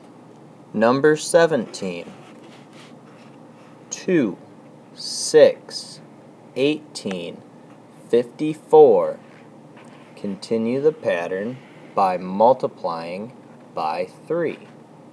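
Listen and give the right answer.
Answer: 162, 486, 1458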